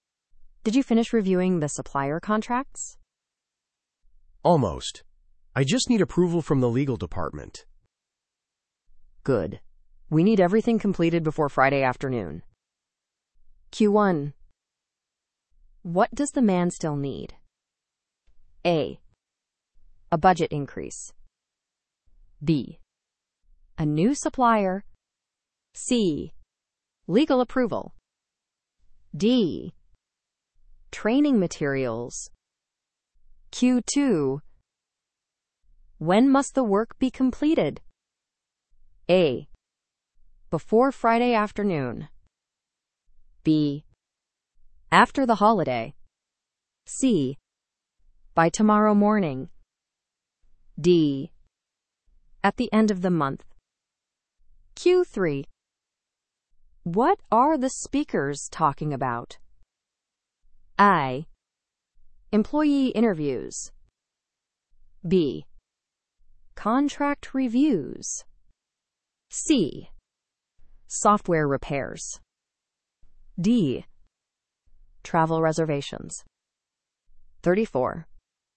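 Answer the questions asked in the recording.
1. C: Legal approval.
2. A: Before Friday afternoon.
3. B: Contract reviews.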